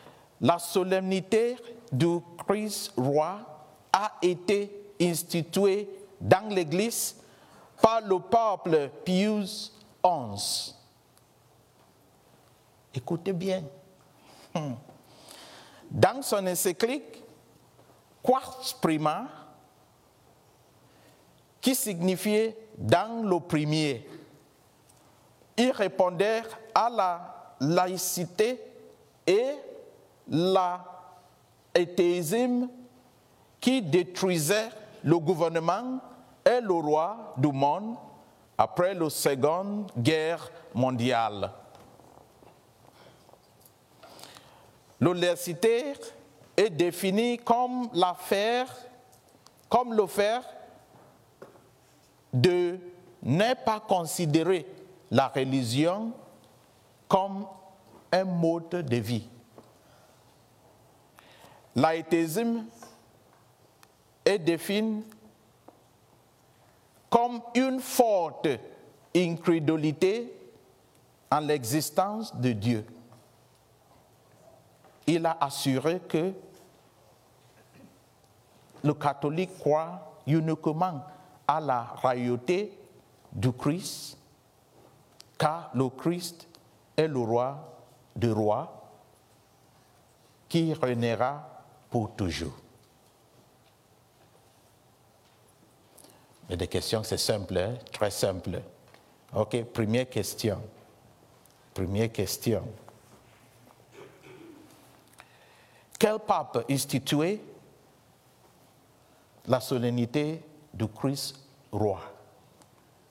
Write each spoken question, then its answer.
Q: Quel pape instituait la solennité du Christ roi?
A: Pius XI.